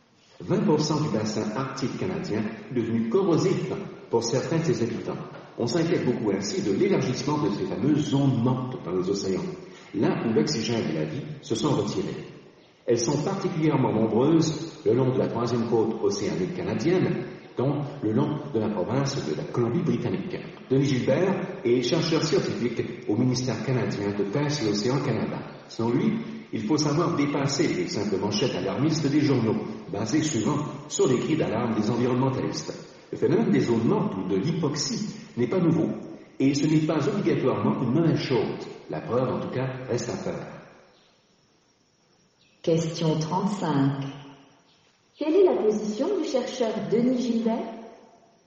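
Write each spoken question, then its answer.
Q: Quelle est la position du chercheur Denis Gilbert?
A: Il est nuancé : il faut dépasser les manchettes alarmistes ; les zones mortes (l'hypoxie) ne sont pas un phénomène nouveau ni forcément une mauvaise chose.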